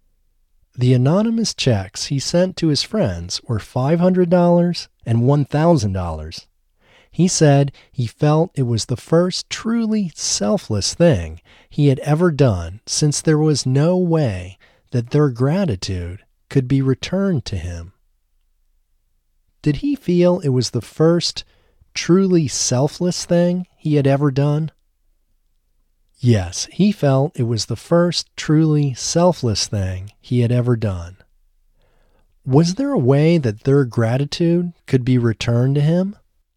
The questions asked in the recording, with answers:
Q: Was there a way that their gratitude could be returned to him?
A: No, there was no way that their gratitude could be returned to him.